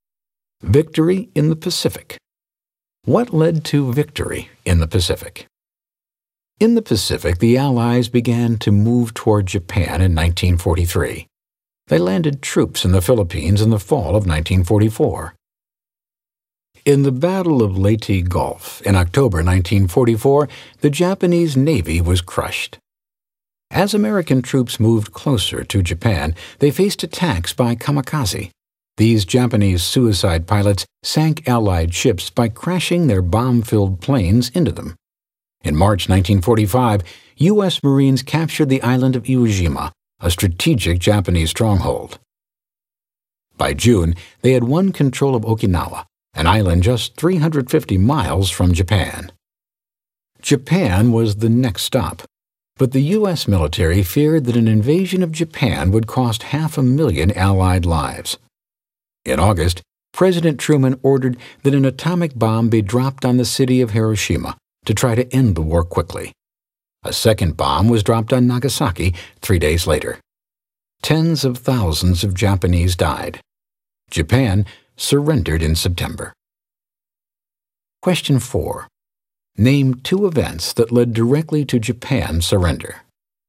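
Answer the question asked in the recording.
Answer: The atomic bombs dropped on Hiroshima and Nagasaki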